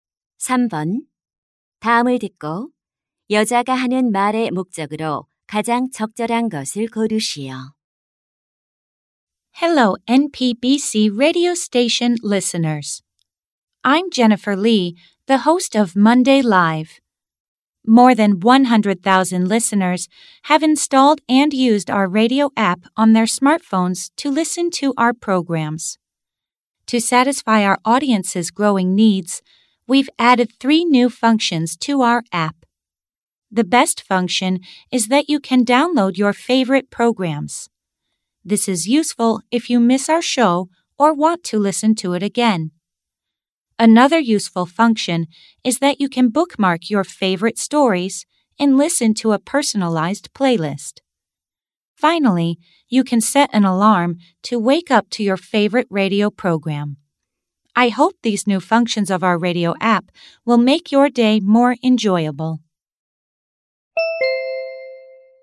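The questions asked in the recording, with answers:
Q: 다음을 듣고 여자가 하는 말의 목적으로 가장 적절한 것을 고르시오.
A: 라디오 앱의 새로운 기능을 소개하려고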